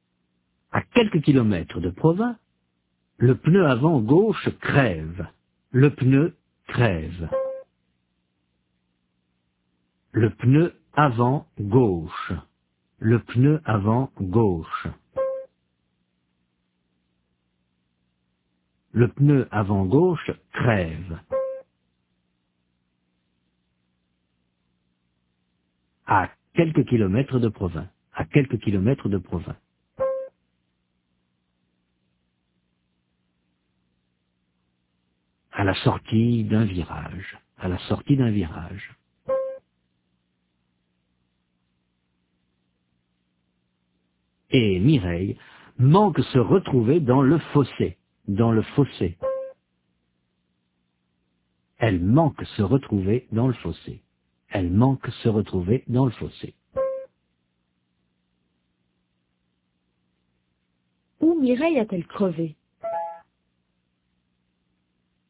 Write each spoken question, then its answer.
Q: Où Mireille a-t-elle crevé ?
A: à la sortie d'un virage.